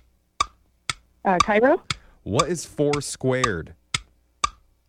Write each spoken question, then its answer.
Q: What is 4 squared?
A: 4 squared would be 16.